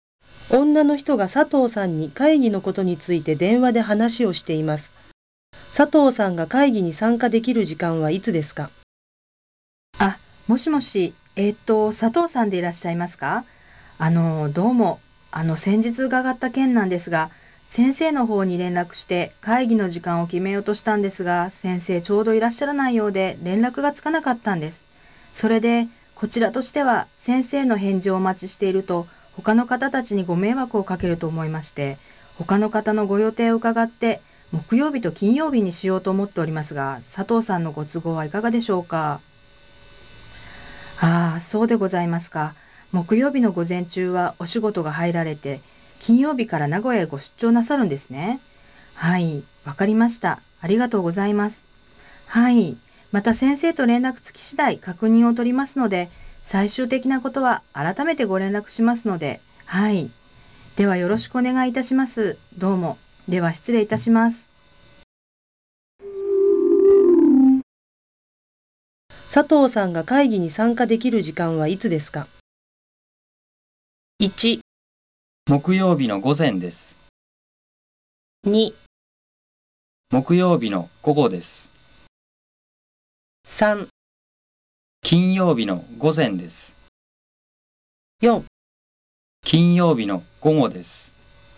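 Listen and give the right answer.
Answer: 2: 木曜日の午後です。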